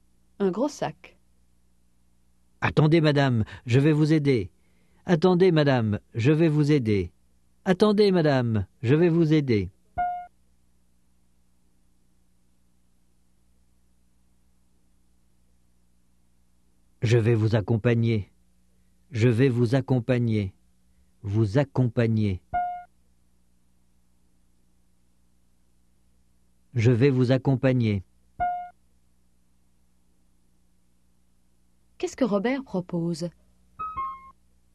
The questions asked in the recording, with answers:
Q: Qu'est-ce que Robert propose?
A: Il propose de l'aider, de l'accompagner.